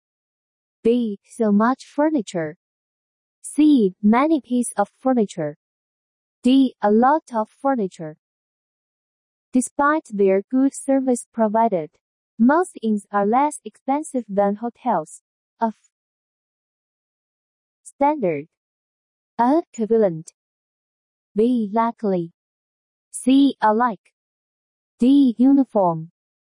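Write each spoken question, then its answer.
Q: Despite their good service provided, most inns are less expensive than hotels of standard.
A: A: Equivalent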